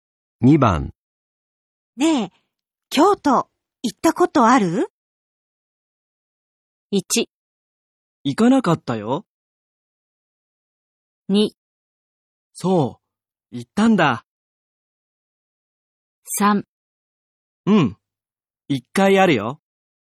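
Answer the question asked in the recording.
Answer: 3: うん、一回あるよ。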